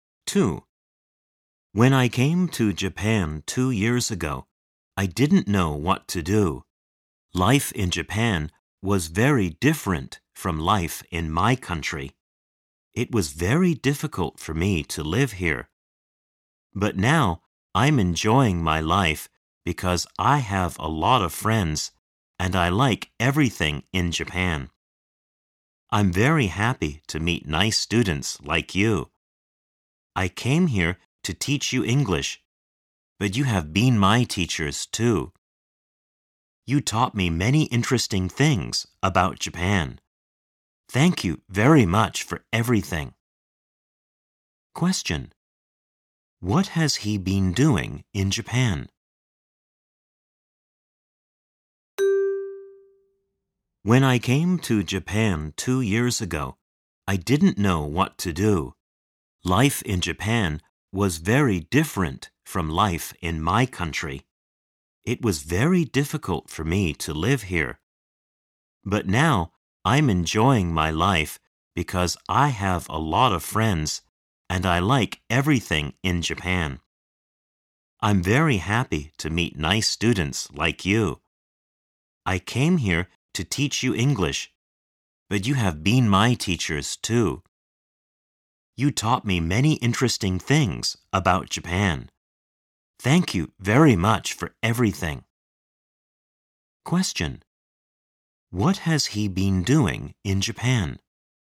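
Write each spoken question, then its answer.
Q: What has he been doing in Japan?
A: Teaching English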